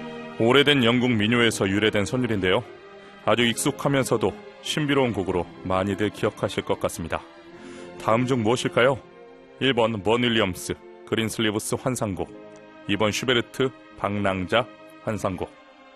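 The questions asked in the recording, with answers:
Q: 다음 중 무엇일까요? 1번 번 윌리엄스 그린슬리브스 환상곡, 2번 슈베르트 방랑자 환상곡.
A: 1: 번 윌리엄스 그린슬리브스 환상곡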